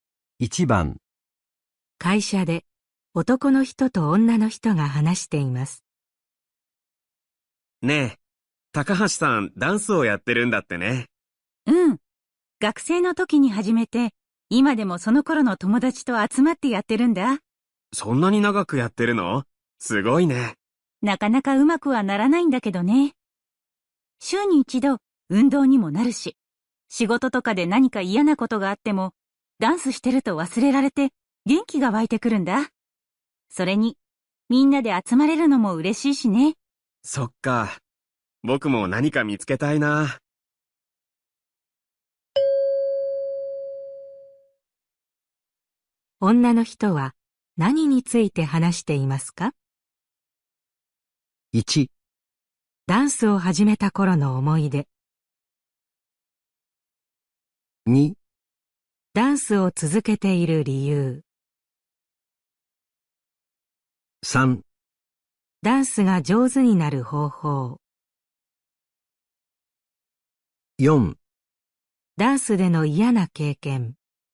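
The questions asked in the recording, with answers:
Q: 女の人は何について話していますか?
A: 2: ダンスを続けている理由。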